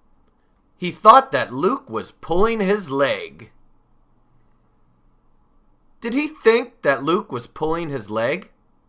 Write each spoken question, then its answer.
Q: Did he think that Luke was pulling his leg?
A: Yes, he did. He thought that Luke was pulling his leg.